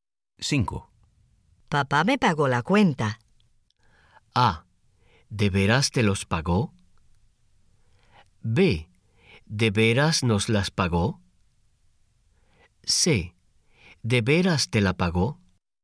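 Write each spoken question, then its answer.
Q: Papá me pagó la cuenta.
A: C: ¿De veras te la pagó?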